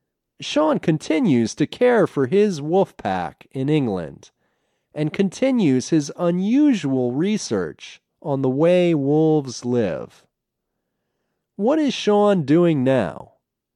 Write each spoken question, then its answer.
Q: What is Sean doing now?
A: He continues to care for his wolf pack in England, and he continues his unusual research on the way wolves live.